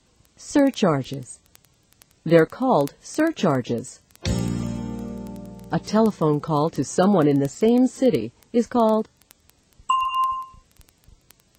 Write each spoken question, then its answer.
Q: A telephone call to someone in the same city is called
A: a local call. It's called a local call.